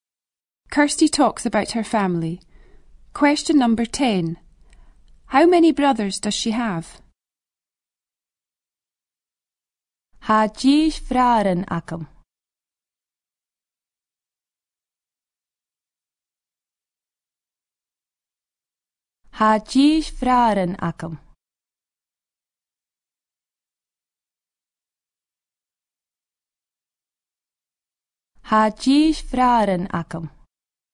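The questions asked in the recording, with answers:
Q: How many brothers does she have?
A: two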